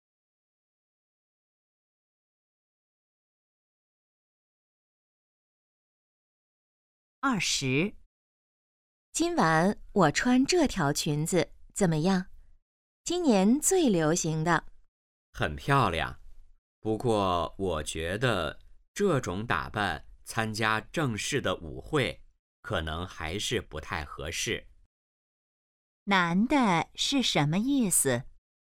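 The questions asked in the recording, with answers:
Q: 男的是什么意思?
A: 这条裙子不适合参加正式舞会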